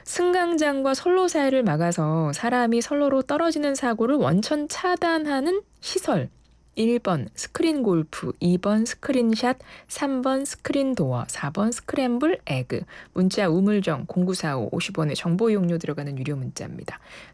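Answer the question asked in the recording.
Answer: 3: 스크린 도어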